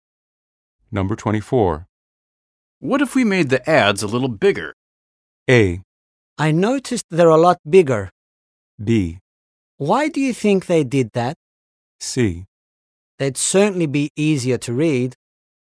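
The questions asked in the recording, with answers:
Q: What if we made the ads a little bigger?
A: C: They'd certainly be easier to read.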